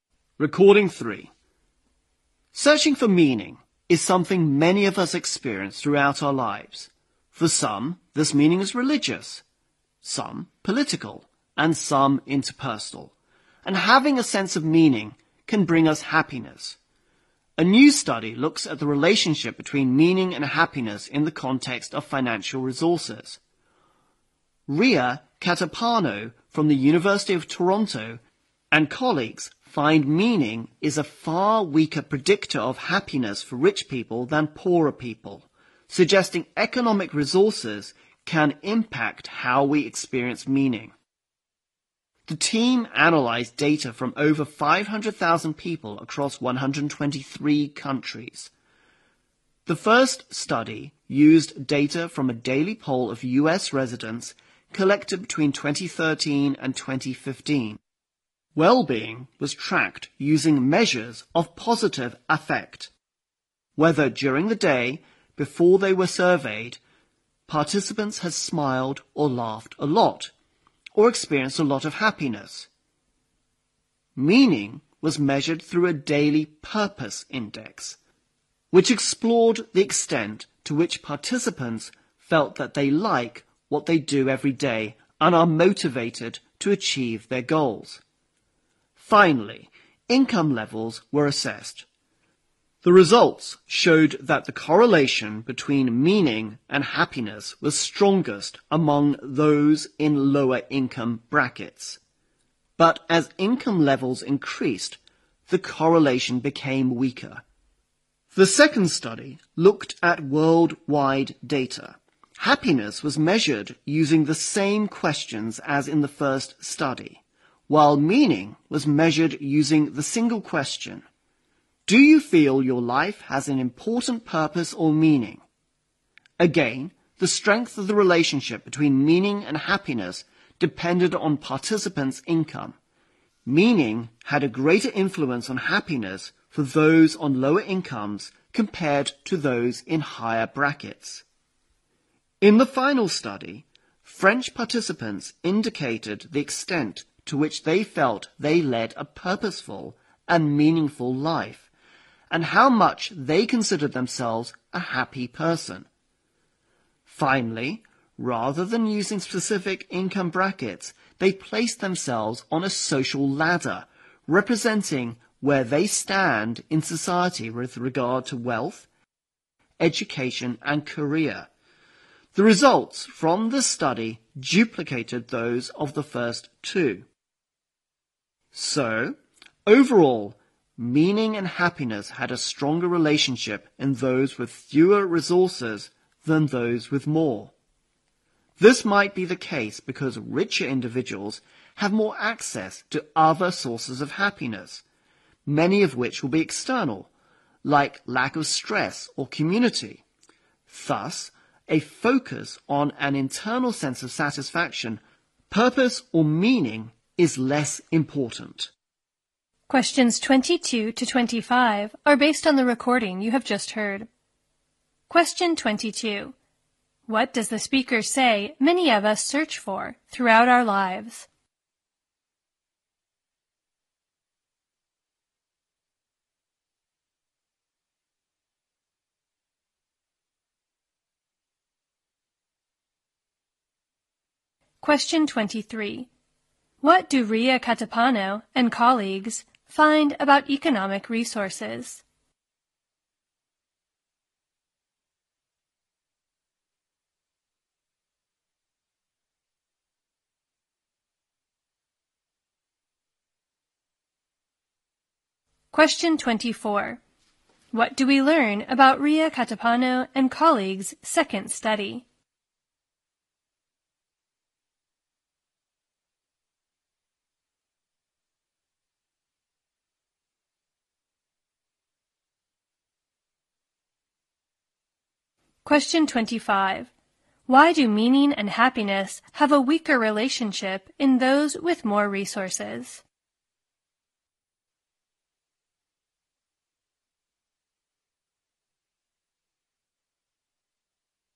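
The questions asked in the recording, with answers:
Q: What does the speaker say many of us search for throughout our lives?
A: Meaning

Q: What do Rhea Catapano and colleagues find about economic resources?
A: They can impact how we experience meaning

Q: What do we learn about Rhea Catapano and colleagues' second study?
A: It used worldwide data and found meaning influenced happiness more for lower-income people

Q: Why do meaning and happiness have a weaker relationship in those with more resources?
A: Richer people have more access to other, external sources of happiness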